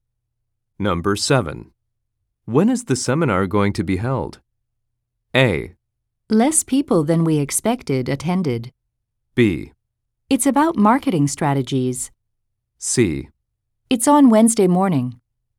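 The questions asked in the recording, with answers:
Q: When is the seminar going to be held?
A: C: It's on Wednesday morning.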